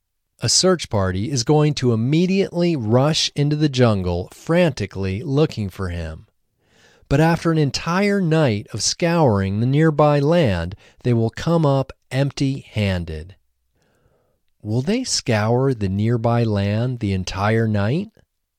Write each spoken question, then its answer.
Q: Will they scour the nearby land the entire night?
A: Yes, they will scour the nearby land the entire night.